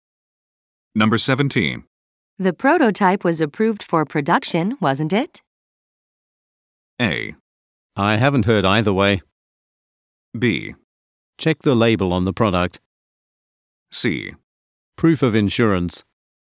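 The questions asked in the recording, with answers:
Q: The prototype was approved for production, wasn't it?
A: A: I haven't heard either way.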